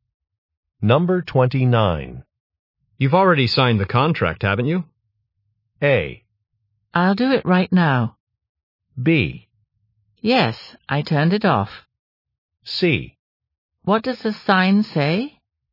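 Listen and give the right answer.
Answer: A: I'll do it right now.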